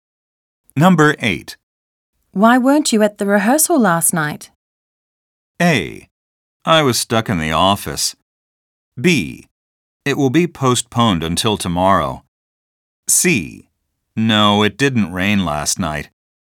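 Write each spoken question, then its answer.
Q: Why weren't you at the rehearsal last night?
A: A: I was stuck in the office.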